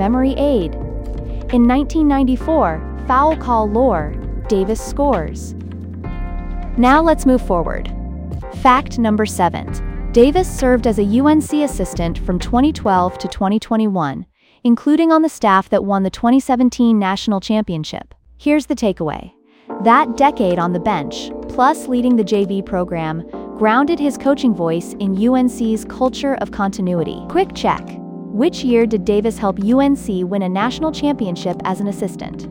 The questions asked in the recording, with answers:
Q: Which year did Davis help UNC win a national championship as an assistant?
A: Correct answer, 2017.